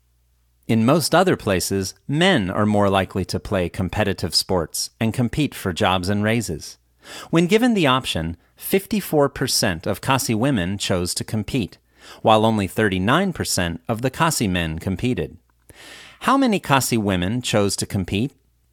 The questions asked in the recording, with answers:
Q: How many Khasi women chose to compete?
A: 54% of Khasi women chose to compete.